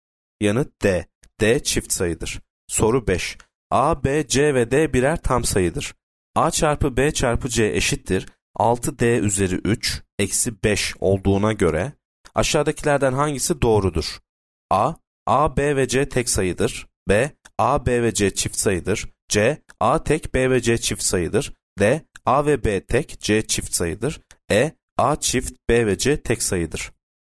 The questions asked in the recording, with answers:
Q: A çarpı B çarpı C eşittir 6D üzeri 3 eksi 5 olduğuna göre aşağıdakilerden hangisi doğrudur?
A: Yanıt A. A, B ve C tek sayıdır.